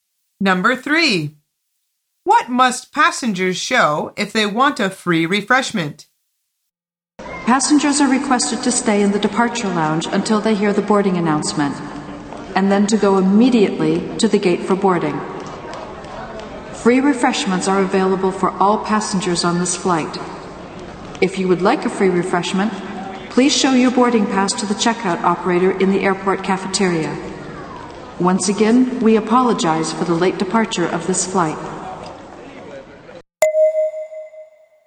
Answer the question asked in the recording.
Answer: The answer is their boarding pass.